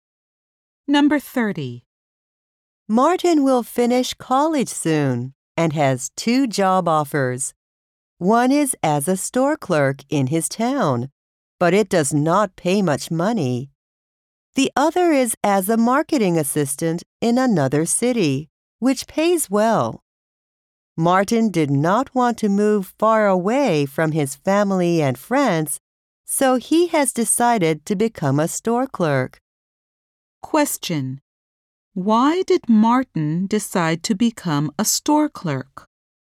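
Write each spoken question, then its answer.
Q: Why did Martin decide to become a store clerk?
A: He did not want to move far away from his family and friends.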